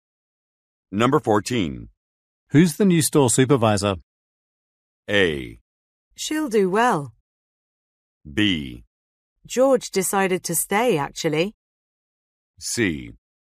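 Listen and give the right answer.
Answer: B: George decided to stay, actually.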